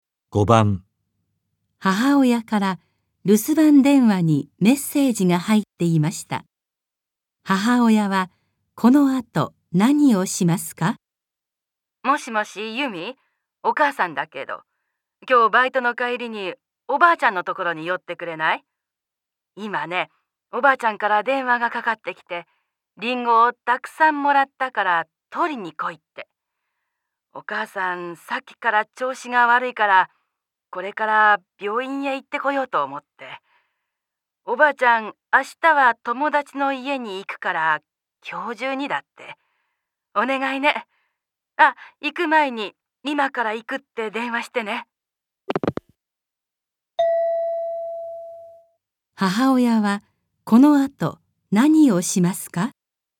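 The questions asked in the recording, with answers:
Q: 母親は、この後、何をしますか?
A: 病院へ行く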